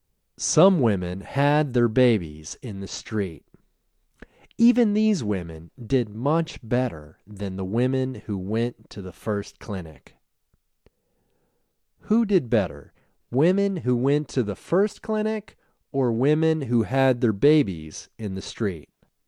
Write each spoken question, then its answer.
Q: Who did better, women who went to the first clinic or women who had their babies in the street?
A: Women who had their babies in the street did better.